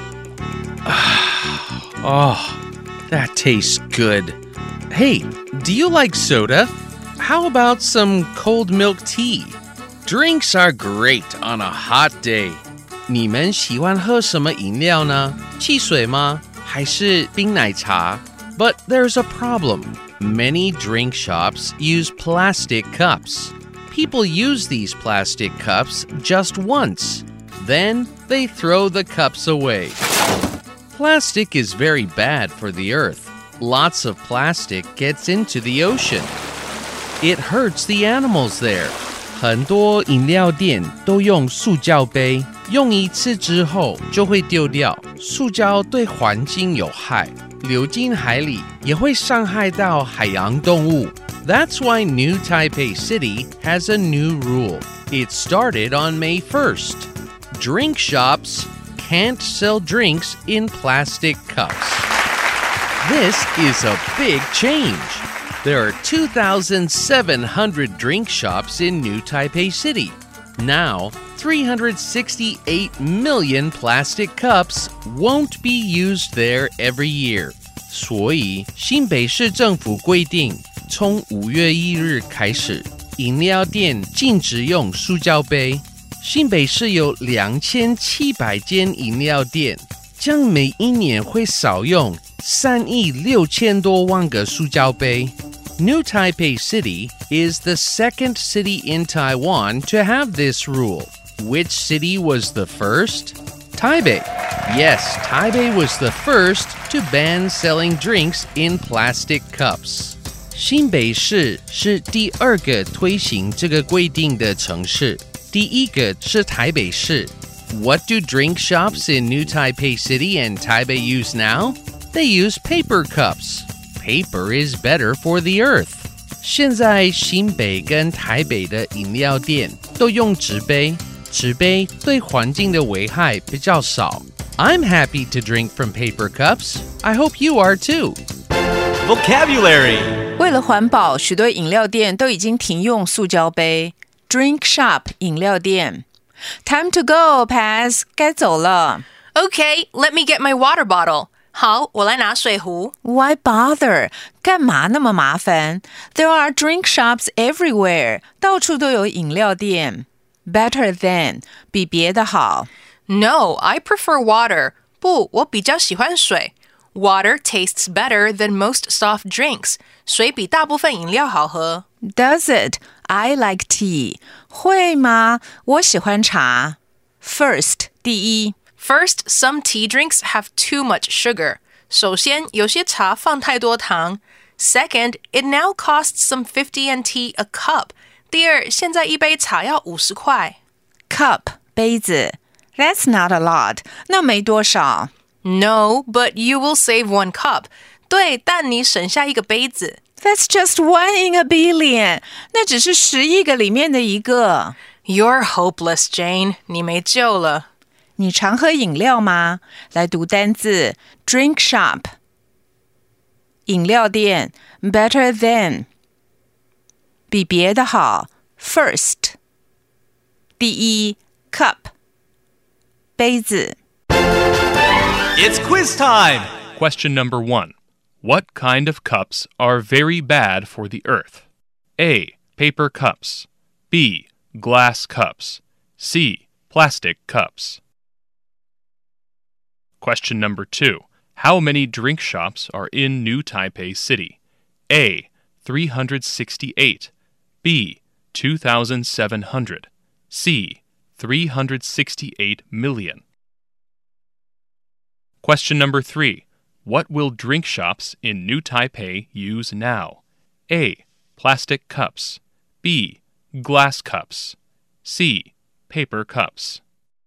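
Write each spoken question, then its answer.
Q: What kind of cups are very bad for the earth?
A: C: Plastic cups

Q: How many drink shops are in New Taipei City?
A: B: 2,700

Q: What will drink shops in New Taipei use now?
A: C: Paper cups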